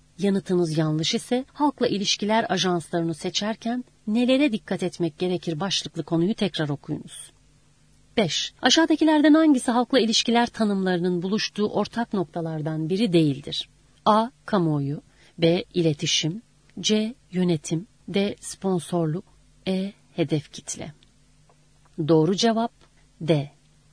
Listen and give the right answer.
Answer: Doğru cevap D.